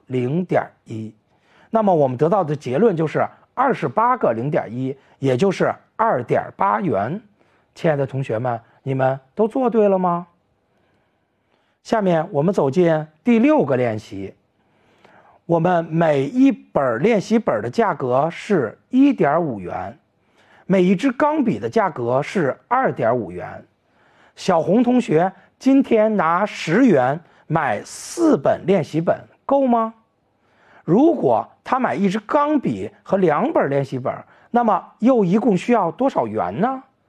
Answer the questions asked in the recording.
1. 这里面1.5乘4等于6元,而六小于十,说明我们10元买4本是够的。
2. 说明买一支钢笔和2本练习本一共需要5.5元